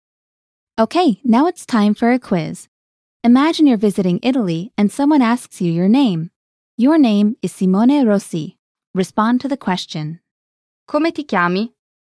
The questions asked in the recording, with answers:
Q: Come ti chiami?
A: Mi chiamo Simone Rossi.